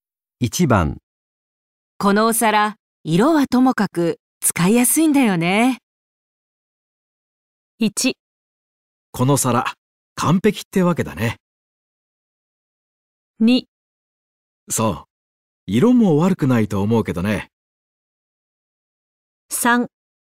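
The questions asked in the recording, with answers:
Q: このお皿、色はともかく使いやすいんだよね。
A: 2: そう、色も悪くないと思うけどね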